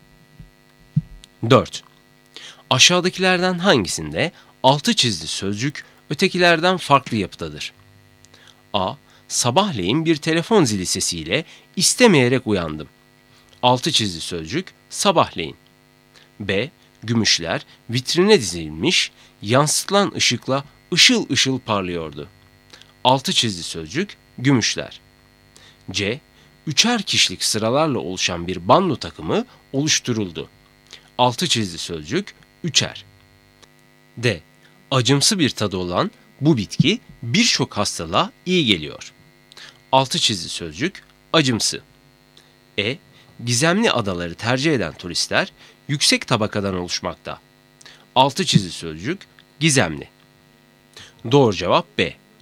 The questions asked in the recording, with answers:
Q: Aşağıdakilerden hangisinde 6 çizgi sözcük ötekilerden farklı yapıdadır?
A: Doğru cevap B.